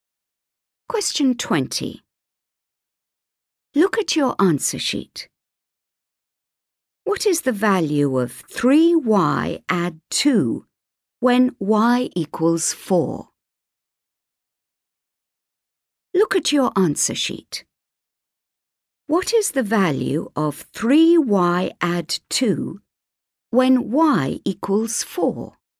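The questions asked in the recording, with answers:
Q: What is the value of 3y add 2 when y equals 4?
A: 14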